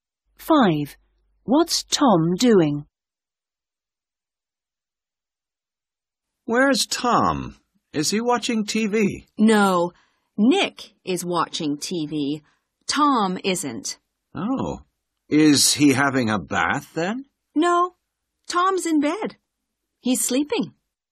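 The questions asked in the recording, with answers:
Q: What's Tom doing?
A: Sleeping in bed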